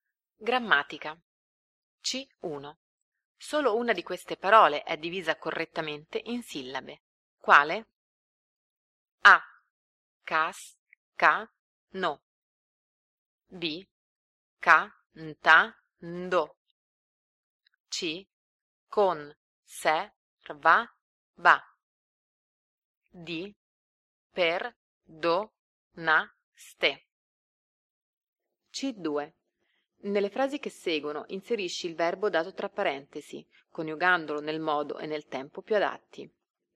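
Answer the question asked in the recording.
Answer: D: Per, do, na, ste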